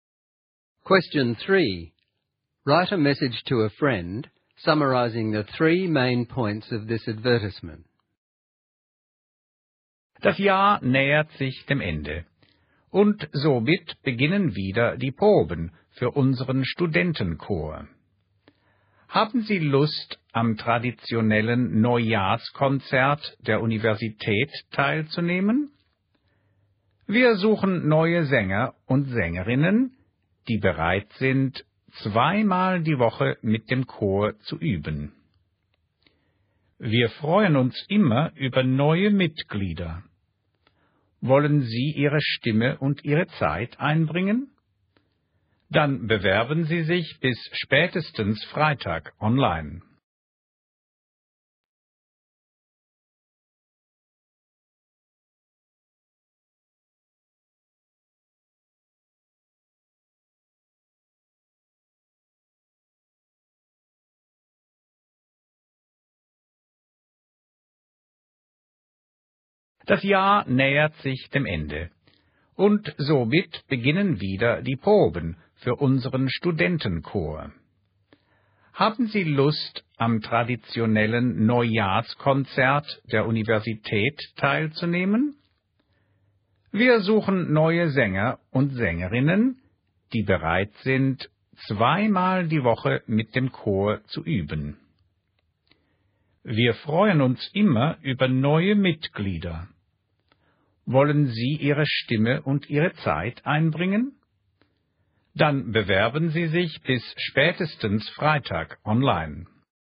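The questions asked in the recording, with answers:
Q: Write a message to a friend summarizing the 3 main points of this advertisement.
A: The university student choir is looking for new singers for the New Year concert; members must rehearse twice a week; apply online by Friday at the latest.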